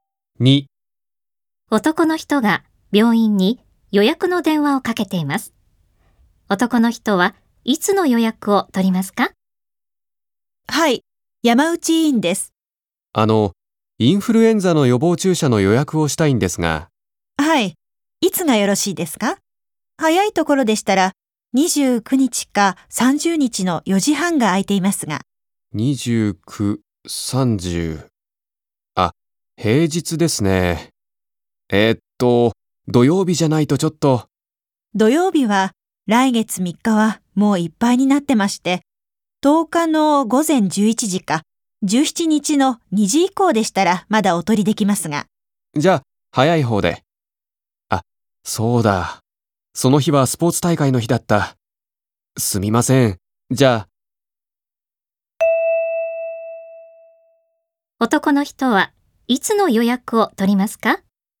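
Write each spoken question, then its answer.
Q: 男の人はいつの予約を取りますか?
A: 17日の2時以降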